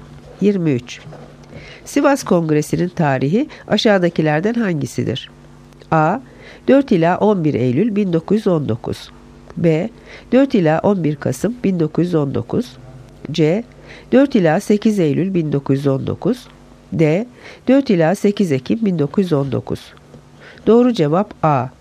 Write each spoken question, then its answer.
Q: Sivas Kongresi'nin tarihi aşağıdakilerden hangisidir?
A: Doğru cevap A. 4 ila 11 Eylül 1919.